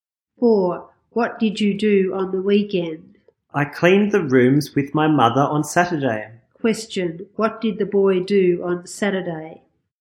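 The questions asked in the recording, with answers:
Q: Question, what did the boy do on Saturday?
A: He cleaned the rooms with his mother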